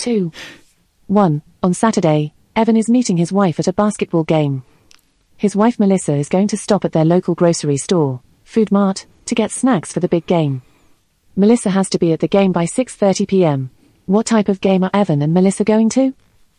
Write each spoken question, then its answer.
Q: What type of game are Evan and Melissa going to?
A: The answer was basketball.